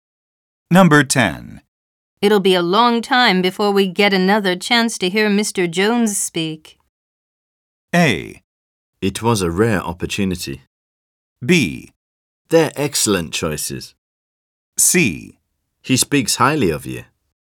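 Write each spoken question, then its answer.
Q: It'll be a long time before we get another chance to hear Mr.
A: A: It was a rare opportunity.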